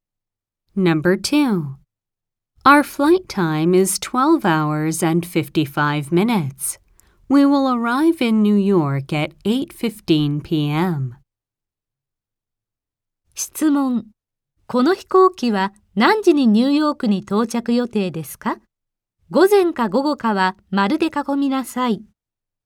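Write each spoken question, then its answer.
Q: この飛行機は何時にニューヨークに到着予定ですか?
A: 午後8時15分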